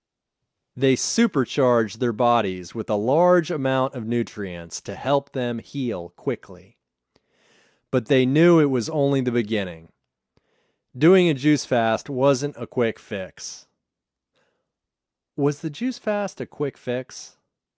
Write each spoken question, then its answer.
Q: Was the juice fast a quick fix?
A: No, the juice fast wasn't a quick fix.